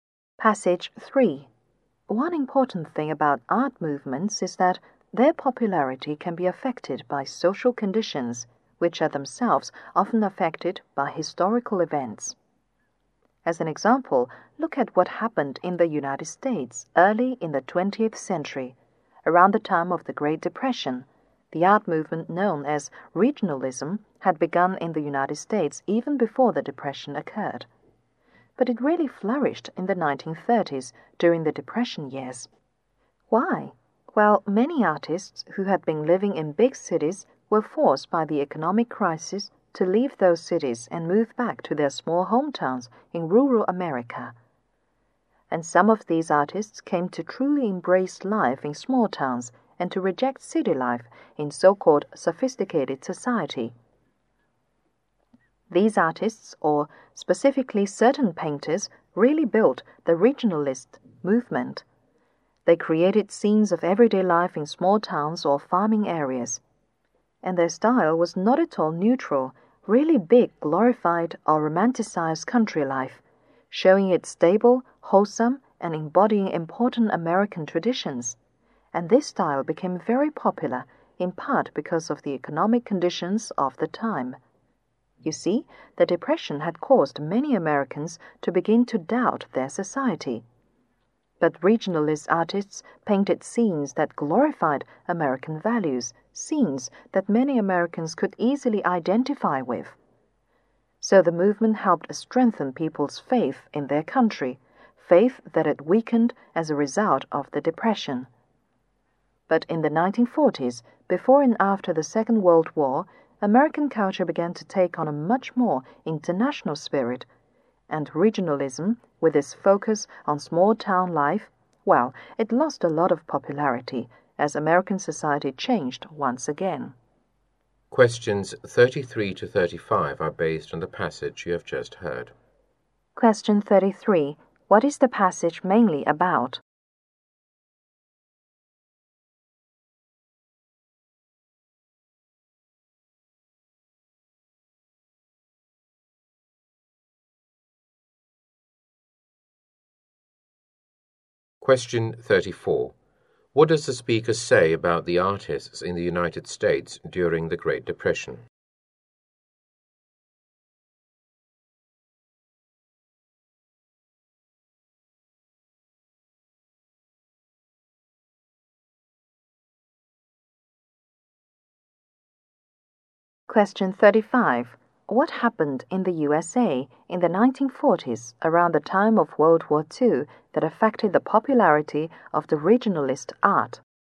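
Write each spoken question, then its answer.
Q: What is the passage mainly about?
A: How social conditions affected the popularity of regionalism in American art.

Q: What does the speaker say about the artists in the United States during the Great Depression?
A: Many were forced to leave big cities and move back to their small rural hometowns.

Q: What happened in the USA in the 1940s, around the time of World War II, that affected the popularity of the regionalist art?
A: American culture took on a much more international spirit.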